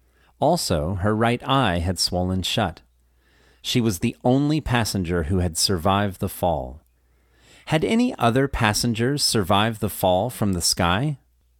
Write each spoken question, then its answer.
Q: Had any other passengers survived the fall from the sky?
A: No, they hadn't. Julianne was the only passenger who had survived the fall.